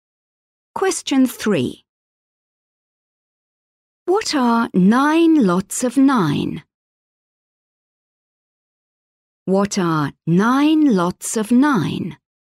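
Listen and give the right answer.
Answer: 81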